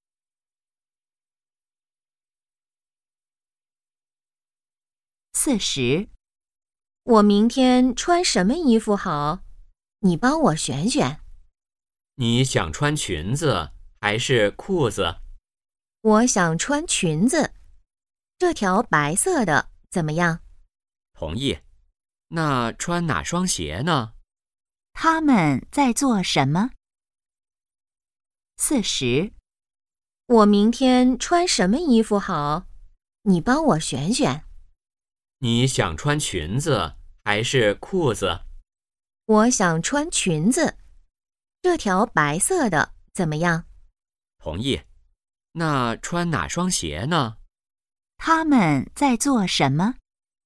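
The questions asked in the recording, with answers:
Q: 他们在做什么?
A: 选衣服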